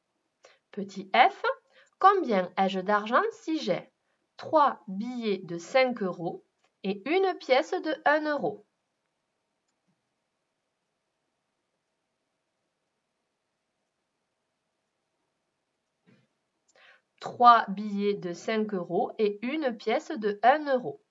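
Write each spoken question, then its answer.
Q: combien ai-je d'argent si j'ai 3 billets de 5 euros et une pièce de 1 euro?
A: 16 euros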